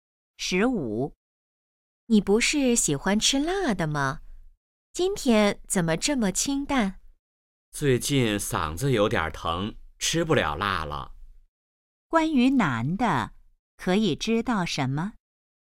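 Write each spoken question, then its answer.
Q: 关于男的,可以知道什么?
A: 最近嗓子疼,吃不了辣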